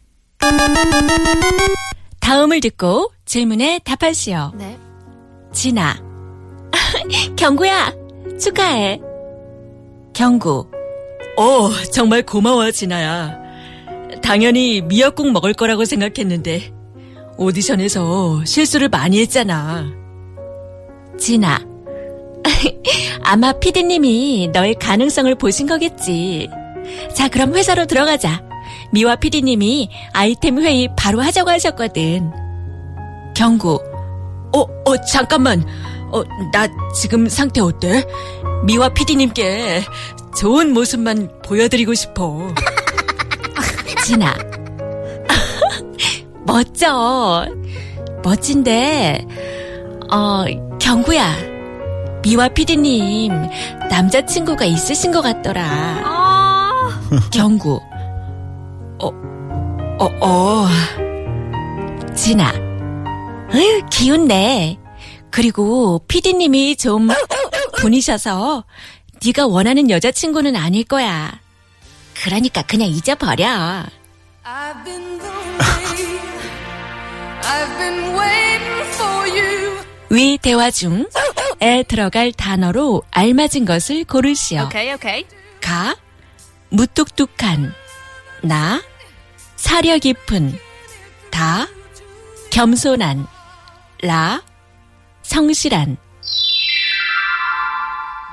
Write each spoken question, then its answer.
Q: 위 대화 중 에 들어갈 단어로 알맞은 것을 고르시오.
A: 미화피디님 is a bit brusque. She isn't so nice.